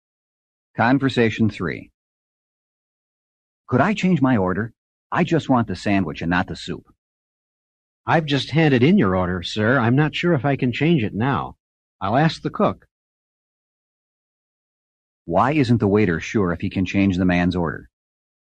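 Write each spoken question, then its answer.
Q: Why isn't the waiter sure if he can change the man's order?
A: He has already handed in the order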